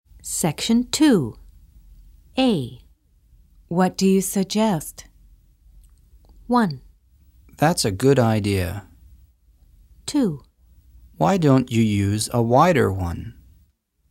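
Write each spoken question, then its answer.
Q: What do you suggest?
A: 2: Why don't you use a wider one?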